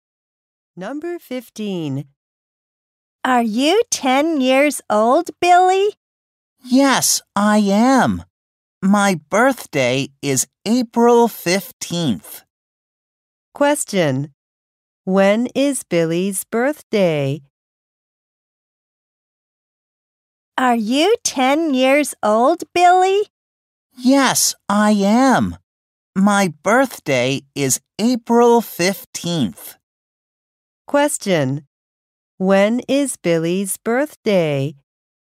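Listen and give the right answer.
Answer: April 15th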